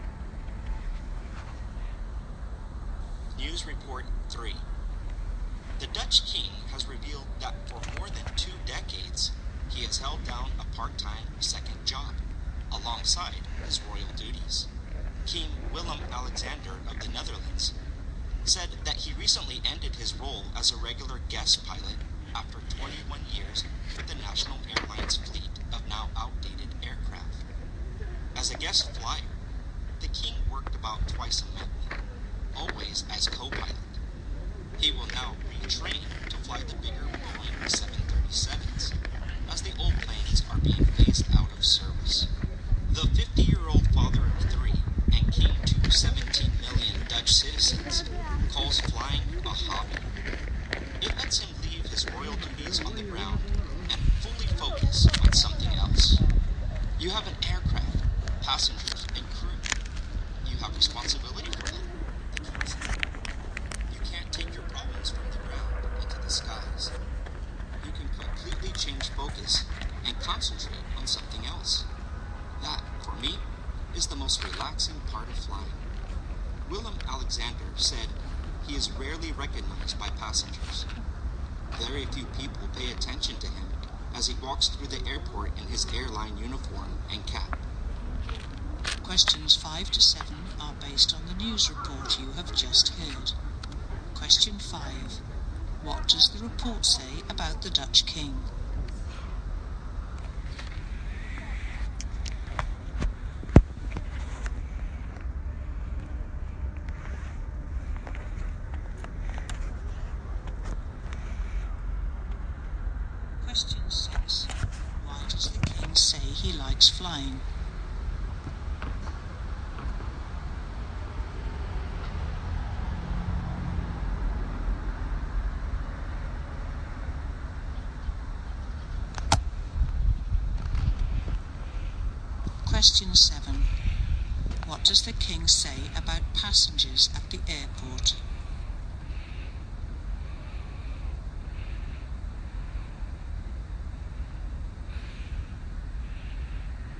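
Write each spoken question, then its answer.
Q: What does the report say about the Dutch King?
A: For 21 years he had a part-time second job as a guest co-pilot for the national airline.

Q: Why does the King say he likes flying?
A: He can completely change focus and leave his problems on the ground, which relaxes him.

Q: What does the King say about passengers at the airport?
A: They rarely recognize him.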